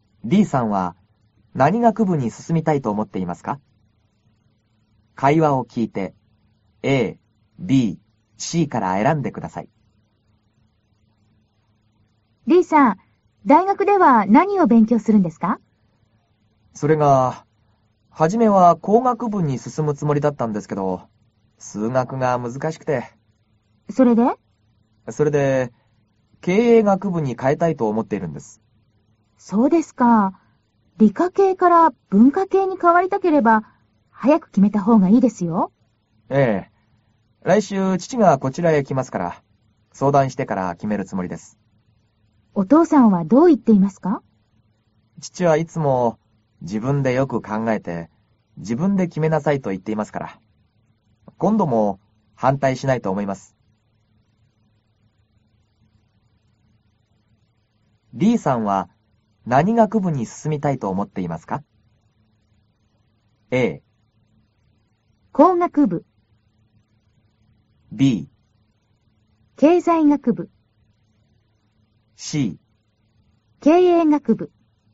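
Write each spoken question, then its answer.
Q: D さんは何学部に進みたいと思っていますか?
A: C: 経営学部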